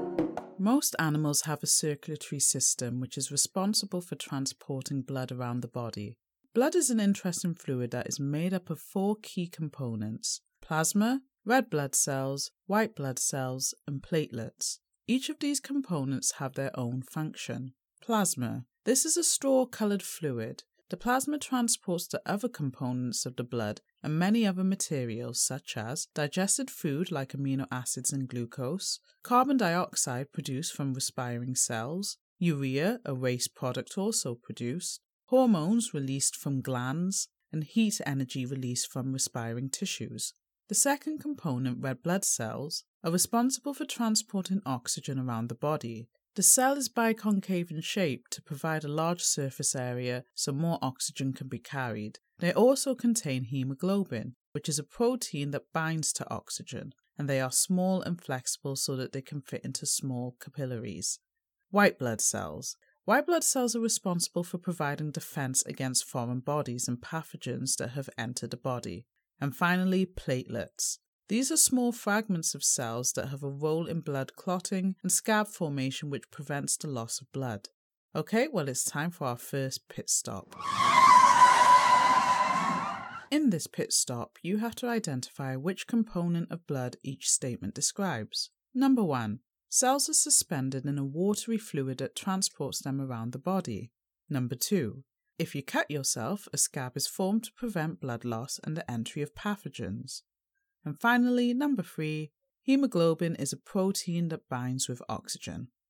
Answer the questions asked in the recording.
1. This statement describes the component plasma.
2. This describes platelets.
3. This statement helps to describe the red blood cells.